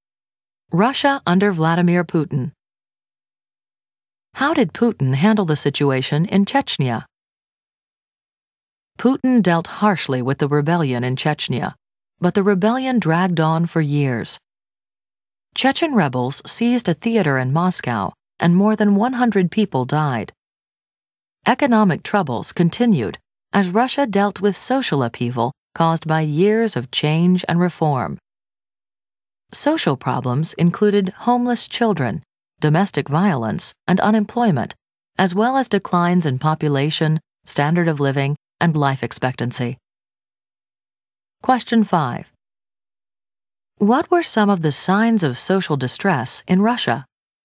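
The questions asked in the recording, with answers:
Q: What were some of the signs of social distress in Russia?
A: Homeless children, domestic violence, unemployment, and declines in population, standard of living and life expectancy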